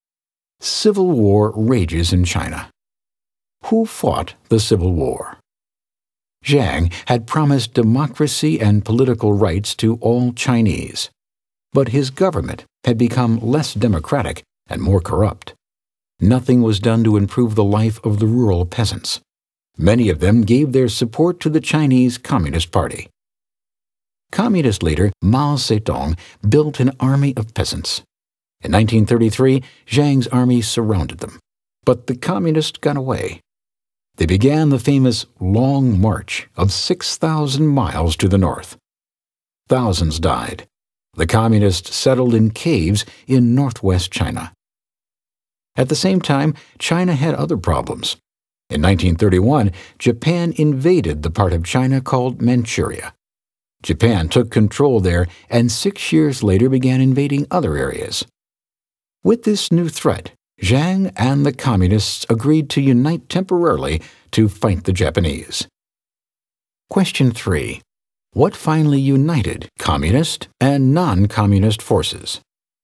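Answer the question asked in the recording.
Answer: The Japanese invasion of China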